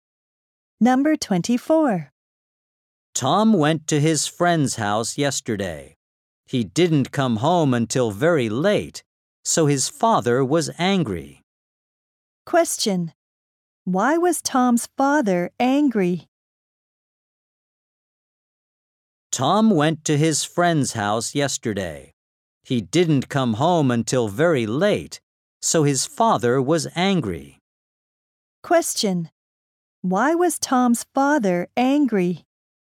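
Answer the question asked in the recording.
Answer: Tom came home very late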